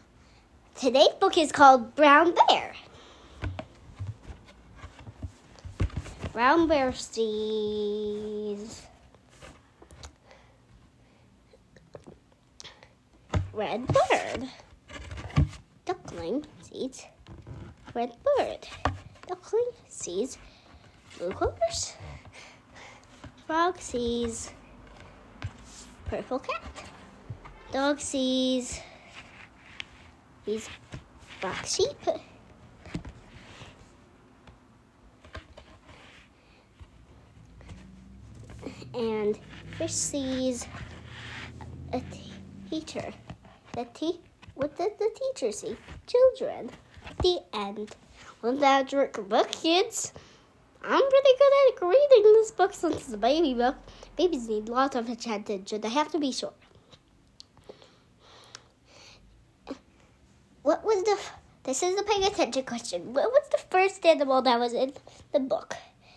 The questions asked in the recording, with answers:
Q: What was the first animal that was in the book?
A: If you said brown bear and red bird, you did it!